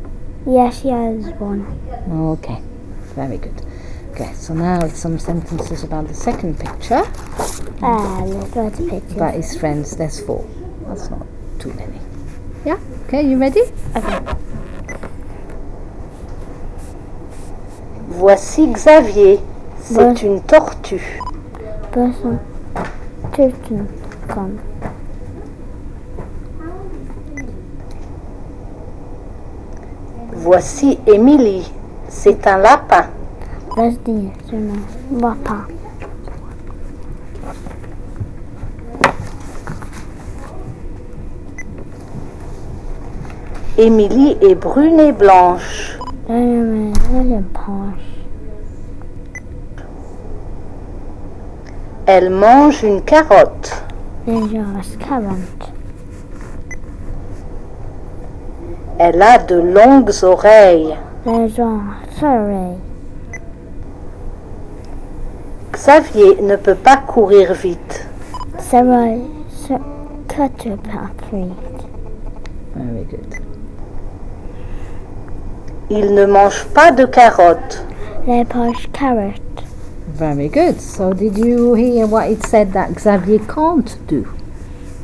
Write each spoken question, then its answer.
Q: So did you hear what it said that Xavier can't do?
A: Run.